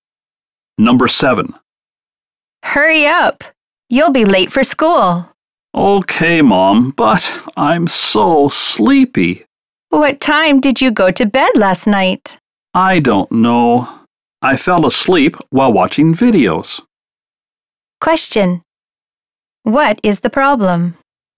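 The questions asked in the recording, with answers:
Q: What is the problem?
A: The child is sleepy because they stayed up late watching videos.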